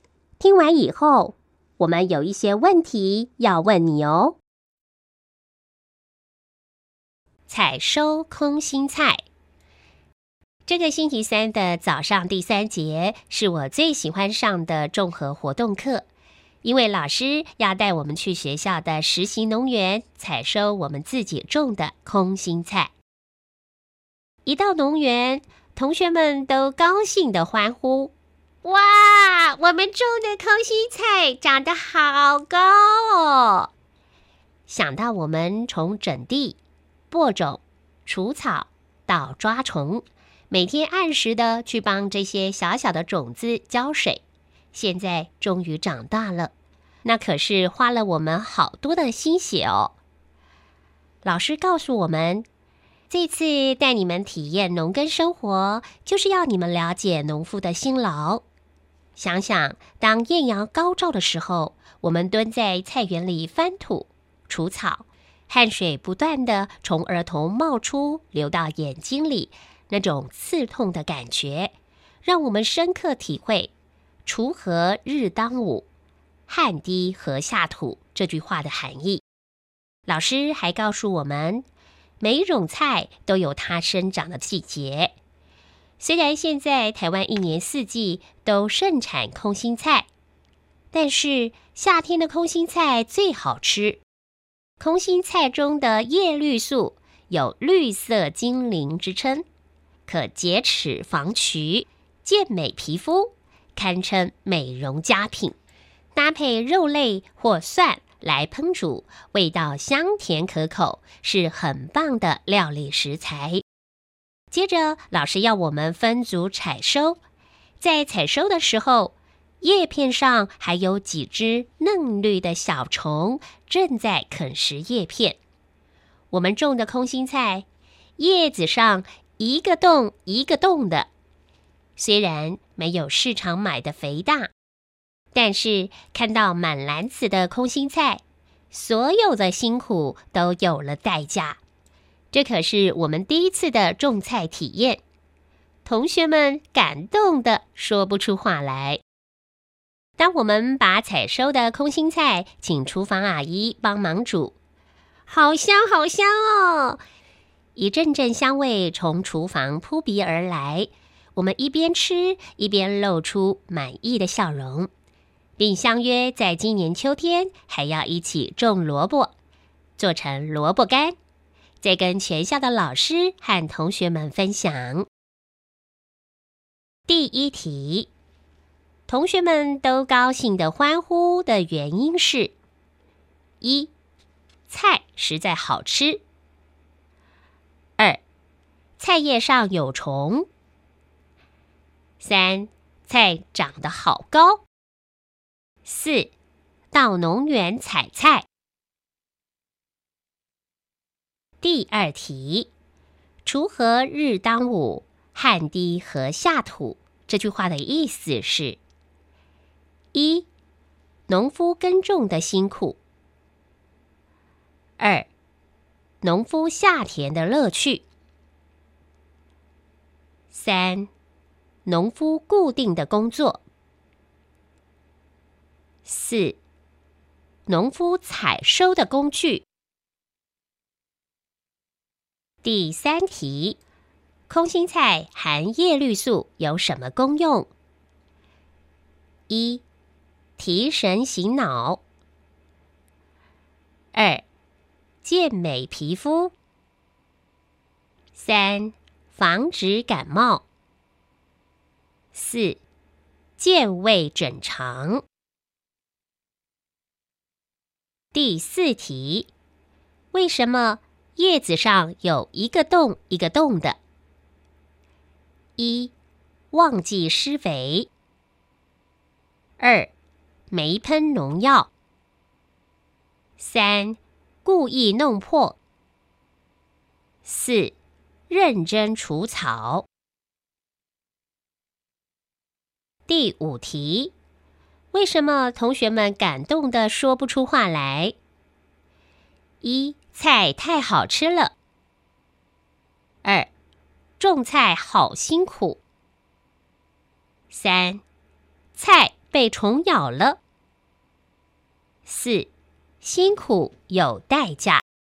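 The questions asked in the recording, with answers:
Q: 同学们都高兴地欢呼的原因是:一,菜实在好吃;二,菜叶上有虫;三,菜长得好高;四,到农园采菜。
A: 三:菜长得好高

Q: 锄禾日当午,汗滴禾下土,这句话的意思是:一,农夫耕种的辛苦;二,农夫下田的乐趣;三,农夫固定的工作;四,农夫采收的工具。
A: 一:农夫耕种的辛苦

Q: 空心菜含叶绿素有什么功用?一、提神醒脑。二、健美皮肤。三、防止感冒。四、健胃整肠。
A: 二:健美皮肤

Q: 为什么同学们感动得说不出话来?一、菜太好吃了。二、种菜好辛苦。三、菜被虫咬了。四、辛苦有代价。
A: 四:辛苦有代价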